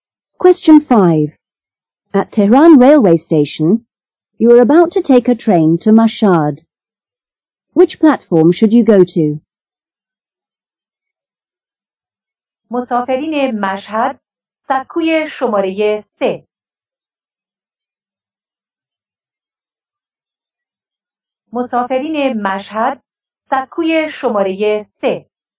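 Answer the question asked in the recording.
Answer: Platform 3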